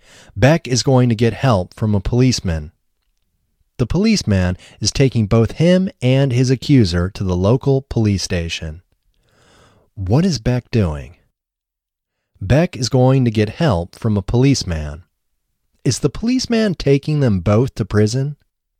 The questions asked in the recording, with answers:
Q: Is the policeman taking them both to prison?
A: No, the policeman isn't taking them both to prison.